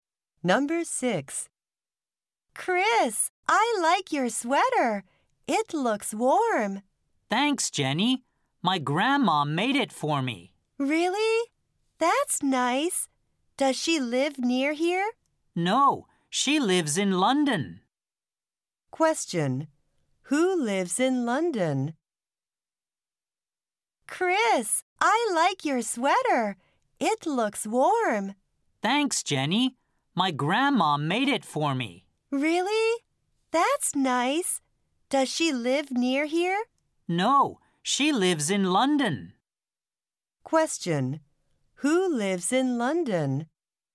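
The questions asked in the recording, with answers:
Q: Who lives in London?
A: Chris's grandma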